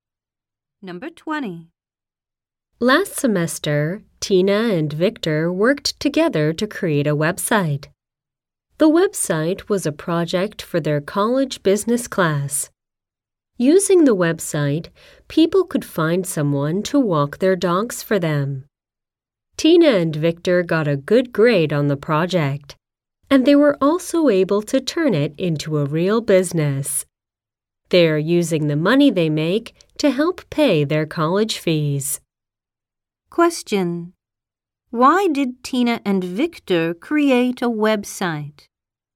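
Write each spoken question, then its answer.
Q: Why did Tina and Victor create a website?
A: For a project in their college business class.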